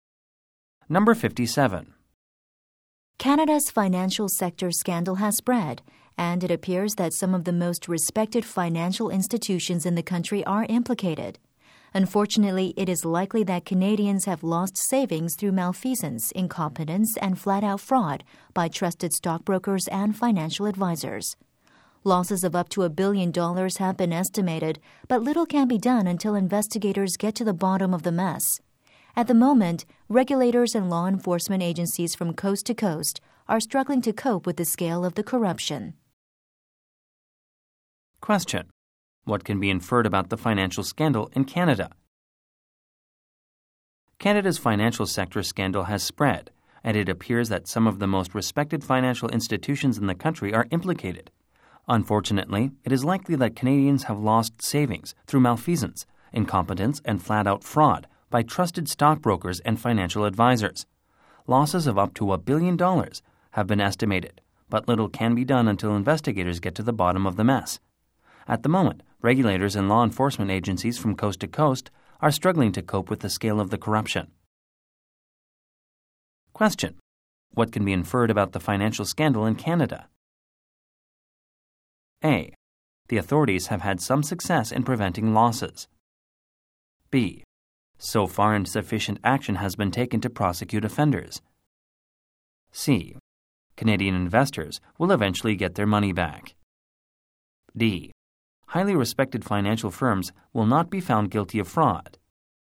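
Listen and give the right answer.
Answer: B: So far, insufficient action has been taken to prosecute offenders.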